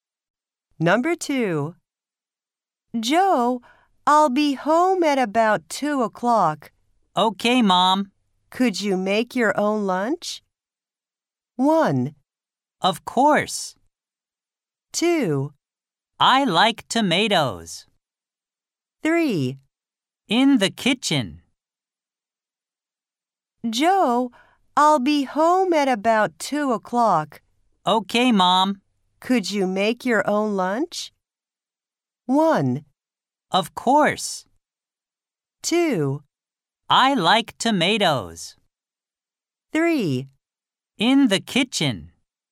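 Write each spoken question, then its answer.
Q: Could you make your own lunch?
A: 1: Of course.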